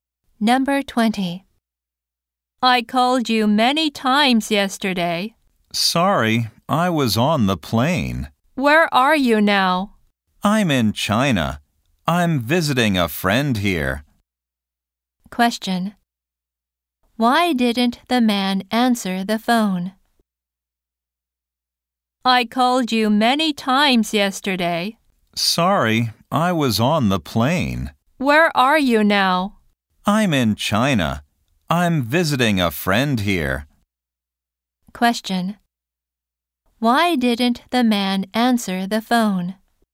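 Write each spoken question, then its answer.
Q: Why didn't the man answer the phone?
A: He was on the plane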